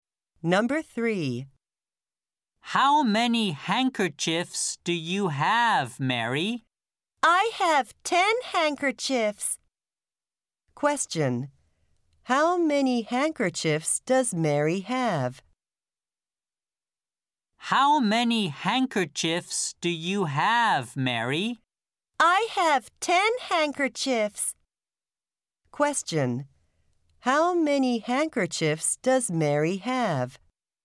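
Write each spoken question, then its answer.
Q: How many handkerchiefs does Mary have?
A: 10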